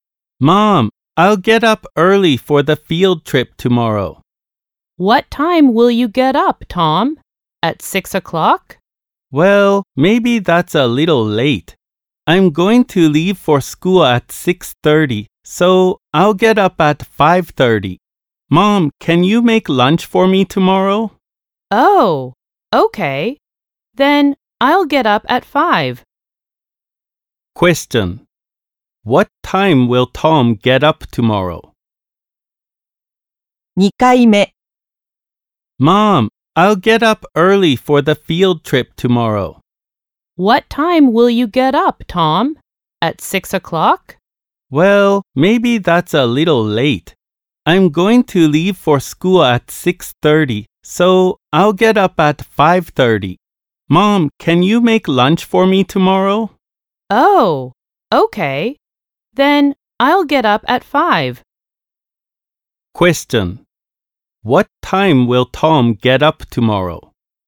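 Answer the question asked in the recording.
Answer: At 5 o'clock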